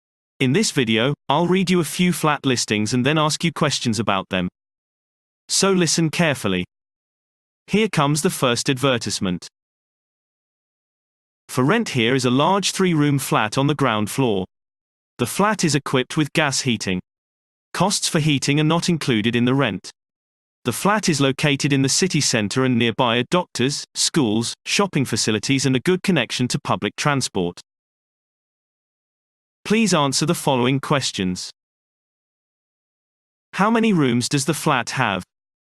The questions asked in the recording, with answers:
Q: How many rooms does the flat have?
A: Answer. It is a three-room flat.